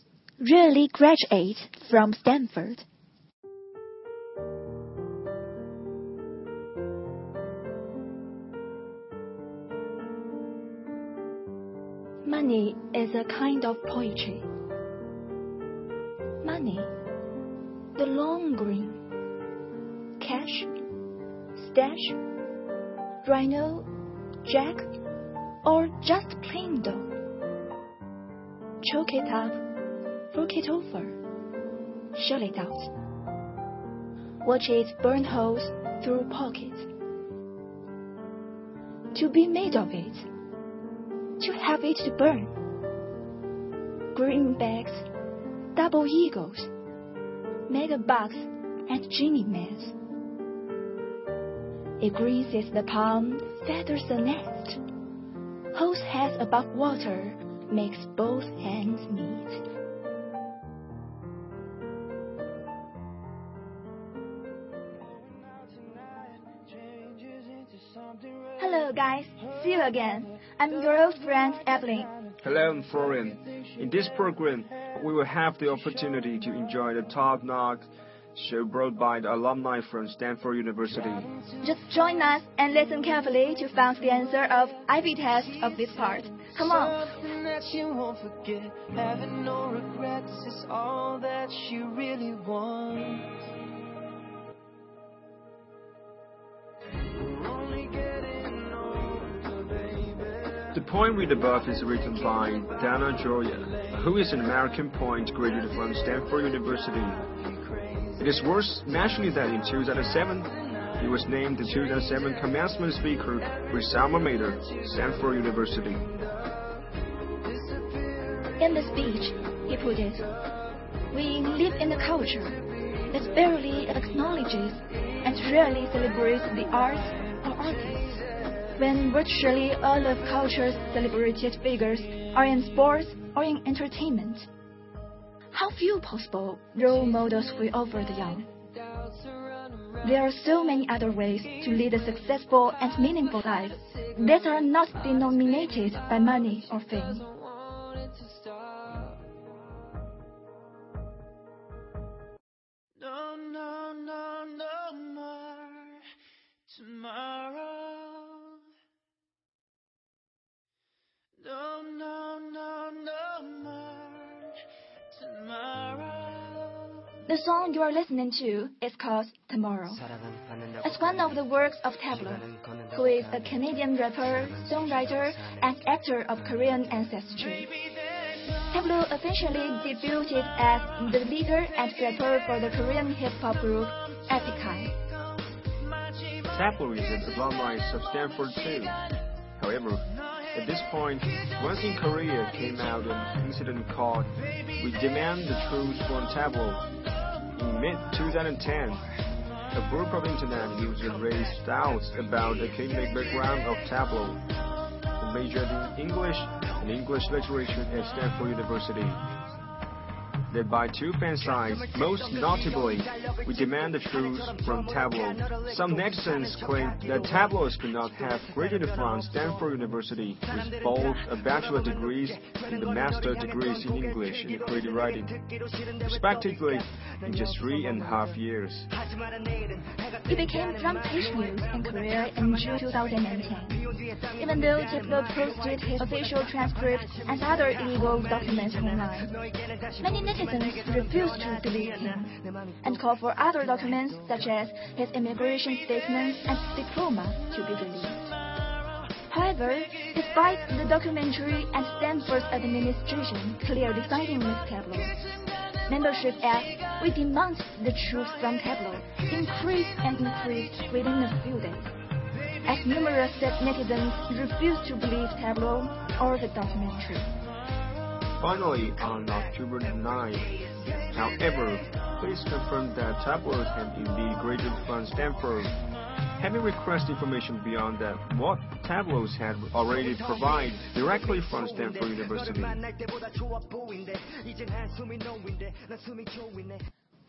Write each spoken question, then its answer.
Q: did Taplow really graduate from Stanford?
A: Tableau is a graduate of Stanford University.